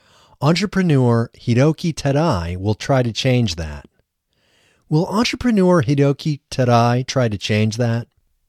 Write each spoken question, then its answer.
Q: Will entrepreneur Hideki Tadai try to change that?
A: Yes, entrepreneur Hideki Tadai will try to change that.